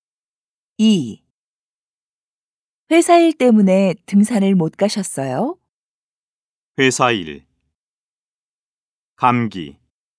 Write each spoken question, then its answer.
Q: 회사 일 때문에 등산을 못 가셨어요?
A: 아니요. 회사 일이 아니라 감기 때문에 등산을 못 갔어요.